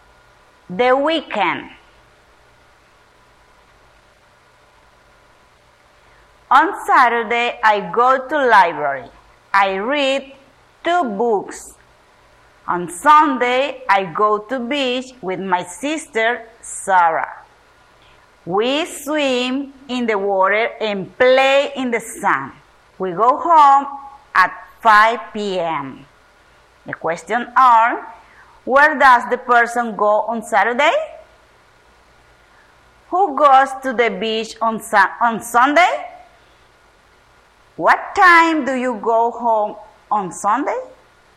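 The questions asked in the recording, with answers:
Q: where does the person go on Saturday?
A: To the library

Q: Who goes to the beach on Sunday?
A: The person and their sister Sarah

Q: What time do you go home on Sunday?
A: 5 p.m.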